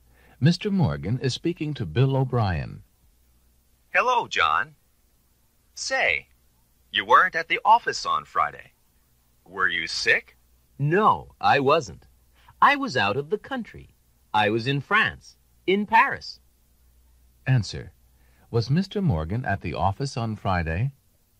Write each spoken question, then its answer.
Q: Was Mr. Morgan at the office on Friday?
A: No, he wasn't.